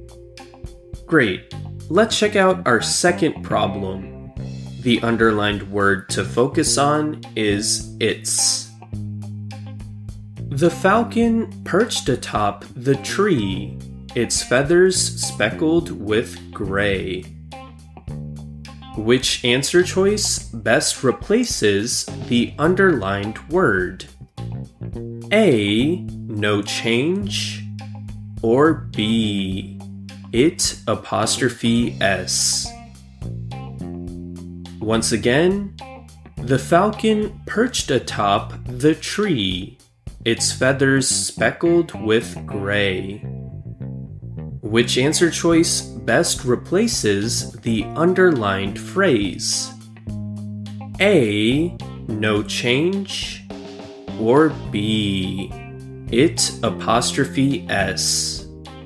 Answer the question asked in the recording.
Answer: we know that the correct answer here is answer choice A, no change.